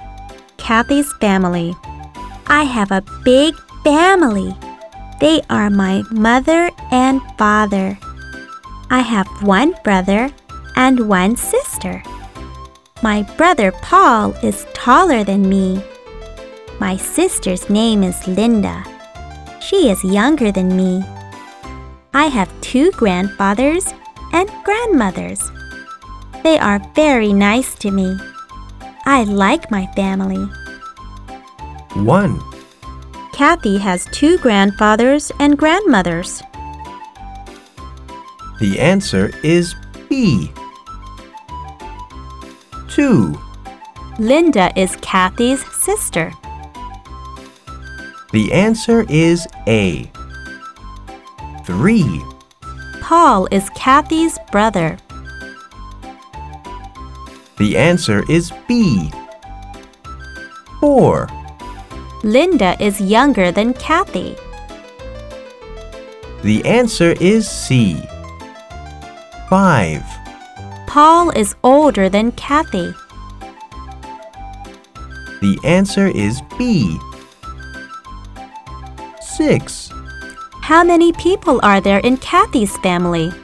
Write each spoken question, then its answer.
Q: How many people are there in Kathy's family?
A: There are 9 people in Kathy's family.